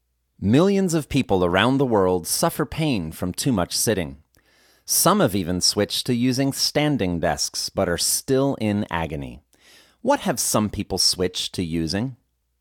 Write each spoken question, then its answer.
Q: What have some people switched to using?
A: Some people have switched to using standing desks.